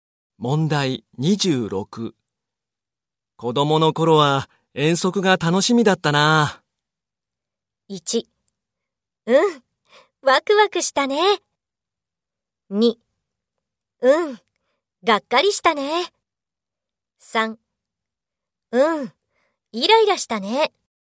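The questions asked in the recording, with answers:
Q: 子供の頃は遠足が楽しみだったな。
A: 3: うん、ワクワクしたね。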